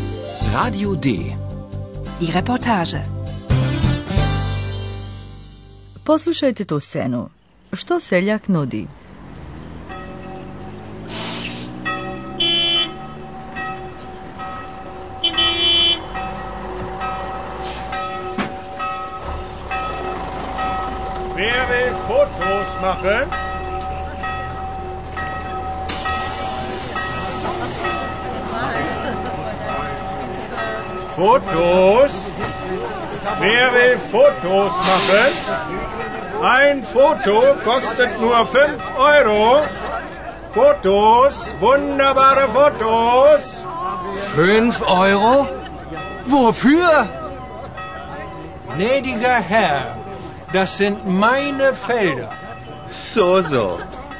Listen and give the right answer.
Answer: Naš seljak samo nudi turistima mogućnost da sami naprave fotografije.